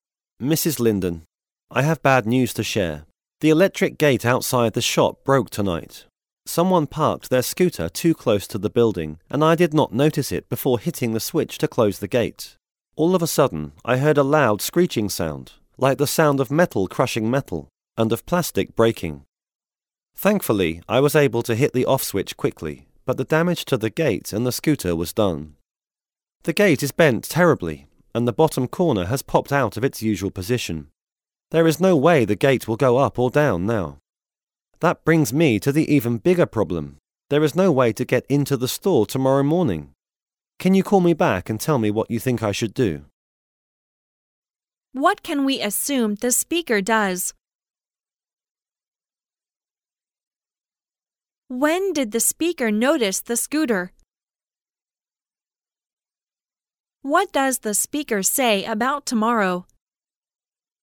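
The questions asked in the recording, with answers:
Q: When did the speaker notice the scooter?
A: After hitting the switch to close the gate

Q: What does the speaker say about tomorrow?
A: There is no way to get into the store in the morning

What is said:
[听力原文] M: Mrs. Lindon, I have bad news to share. The electric gate outside the shop broke tonight. Someone parked their scooter too close to the building and I did not notice it before hitting the switch to close the gate. All of a sudden I heard a loud screeching sound, like the sound of metal crushing metal, and of plastic breaking. Thankfully I was able to hit the off switch quickly, but the damage to the gate and the scooter was done. The gate is bent terribly, and the bottom corner has popped out of its usual position. There is no way the gate will go up or down now. That brings me to the even bigger problem: There is no way to get into the store tomorrow morning. 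Can you call me back and tell me what you think I should do?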